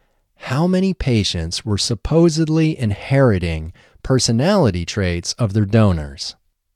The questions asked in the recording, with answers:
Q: How many patients were supposedly inheriting personality traits of their donors?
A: 70 patients were supposedly inheriting personality traits of their donors.